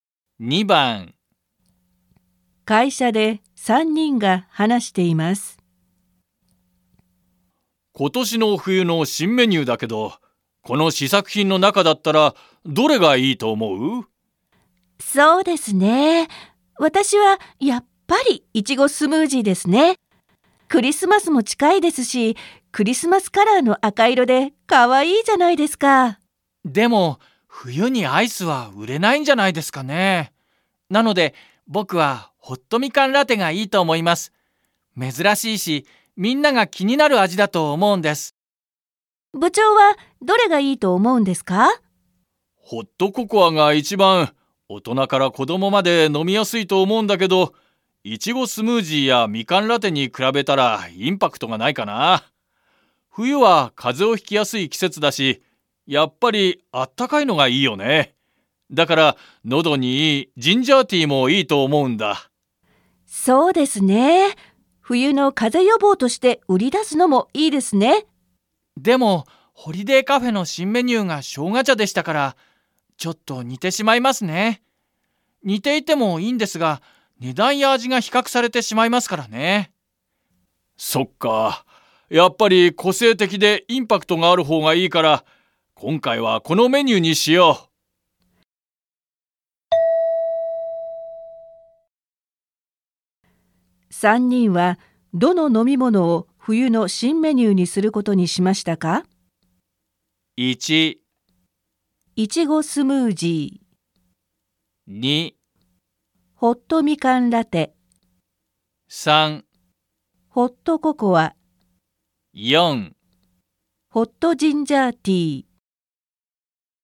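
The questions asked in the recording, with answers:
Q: 3人はどの飲み物を冬の新メニューにすることにしましたか?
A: 2: ホットみかんラテ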